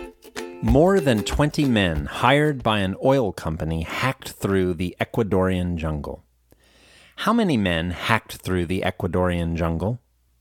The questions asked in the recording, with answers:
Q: How many men hacked through the Ecuadorian jungle?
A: More than 20 men hacked through the Ecuadorian jungle.